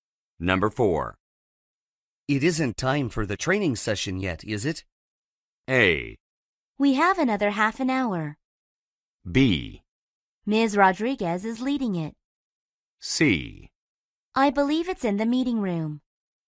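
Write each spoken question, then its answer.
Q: It isn't time for the training session yet, is it?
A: A: We have another half an hour.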